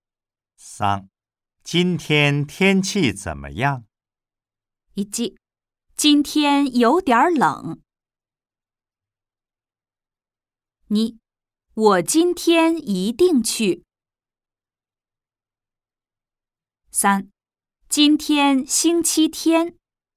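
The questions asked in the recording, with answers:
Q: 今天天气怎么样?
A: 1: 今天有点冷。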